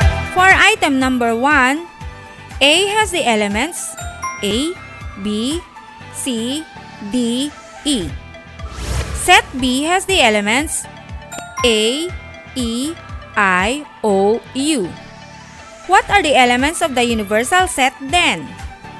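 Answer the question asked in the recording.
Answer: A, B, C, D, E, I, O, U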